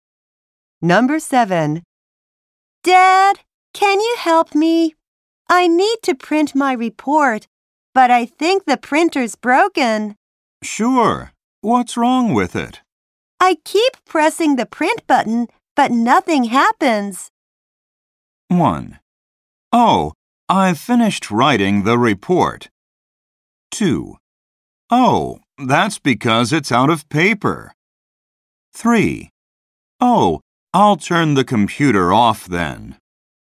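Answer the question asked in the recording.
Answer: 2: Oh, that's because it's out of paper.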